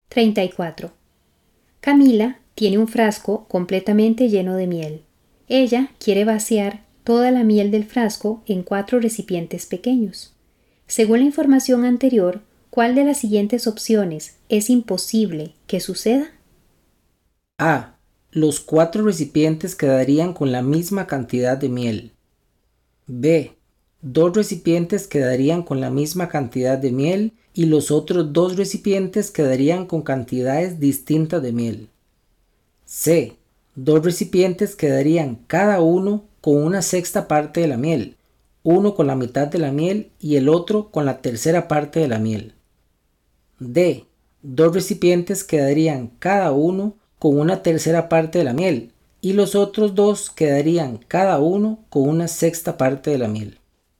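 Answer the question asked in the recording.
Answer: C: 2 recipientes quedarían cada uno con una sexta parte de la miel, uno con la mitad de la miel y el otro con la tercera parte de la miel.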